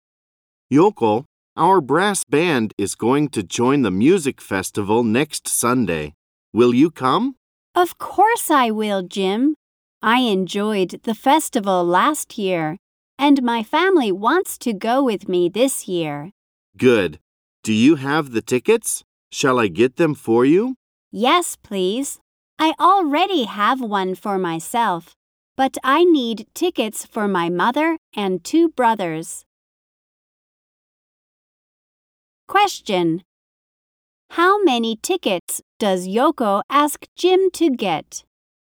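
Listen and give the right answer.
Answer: Three.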